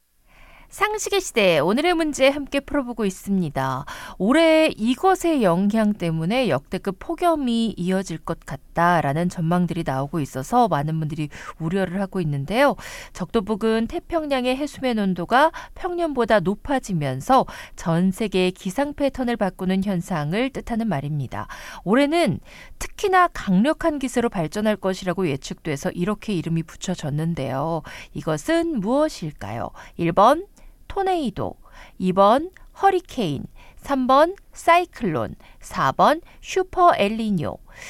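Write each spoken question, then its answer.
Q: 이것은 무엇일까요?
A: 4: 슈퍼 엘니뇨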